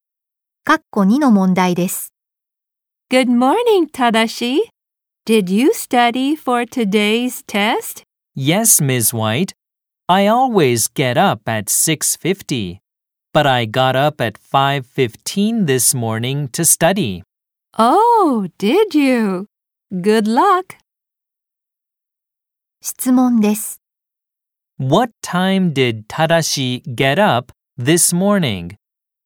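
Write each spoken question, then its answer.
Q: What time did Tadashi get up this morning?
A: At 5:15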